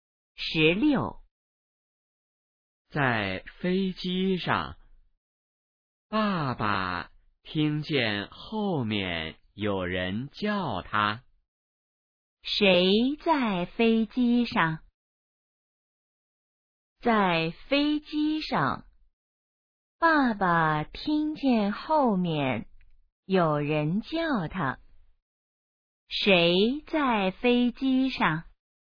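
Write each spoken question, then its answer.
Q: 谁在飞机上?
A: 爸爸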